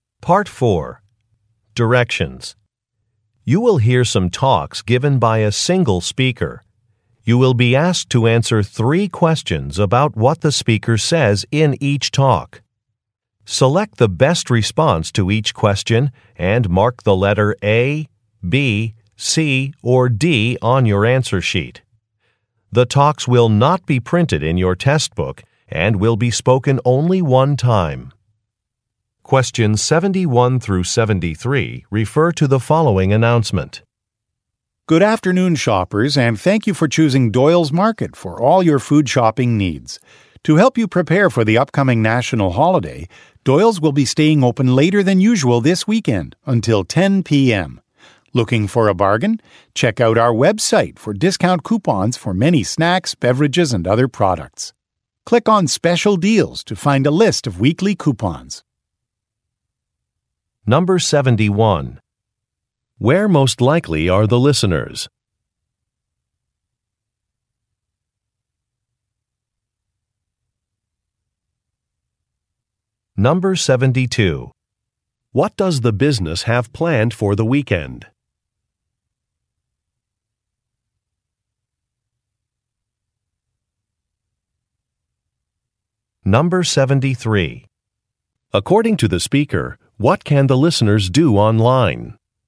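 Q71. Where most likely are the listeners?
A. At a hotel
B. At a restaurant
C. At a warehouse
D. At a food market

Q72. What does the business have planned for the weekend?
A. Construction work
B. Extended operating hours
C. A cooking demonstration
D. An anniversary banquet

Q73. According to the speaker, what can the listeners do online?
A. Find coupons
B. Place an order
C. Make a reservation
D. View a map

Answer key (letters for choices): 71D, 72B, 73A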